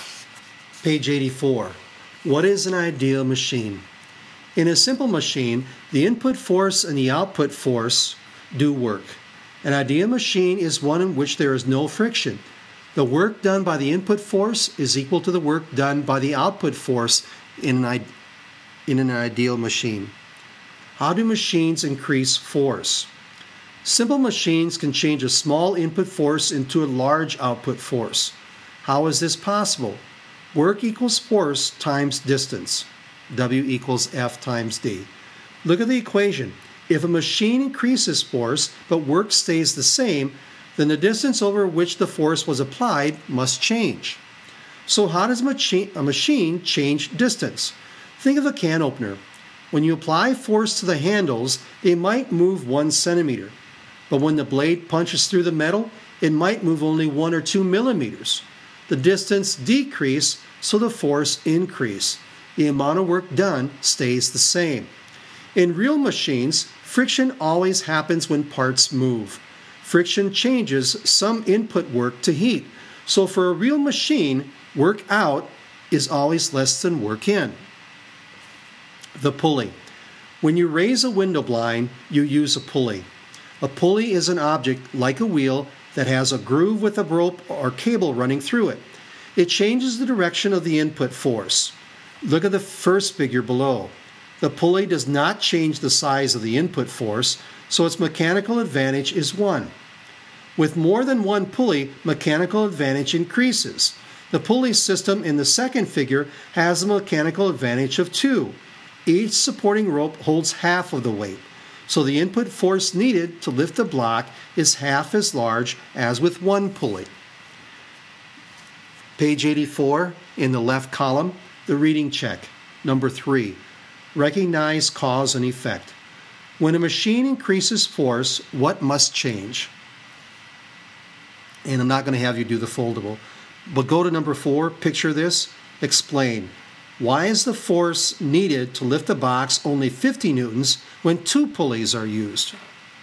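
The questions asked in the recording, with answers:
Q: When a machine increases force, what must change?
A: The distance over which the force is applied

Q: Why is the force needed to lift the box only 50 newtons when 2 pulleys are used?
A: Each supporting rope holds half of the weight, so the input force is halved (mechanical advantage of 2).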